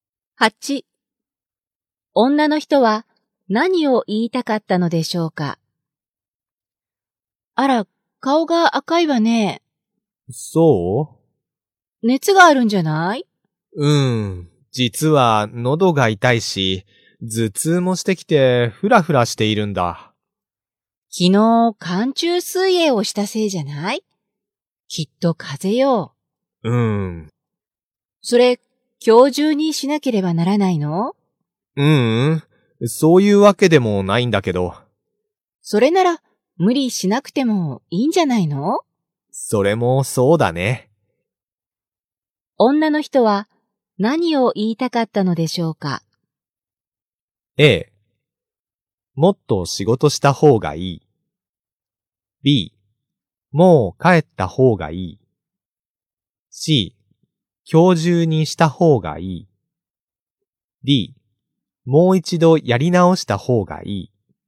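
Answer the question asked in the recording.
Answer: B: もう帰った方がいい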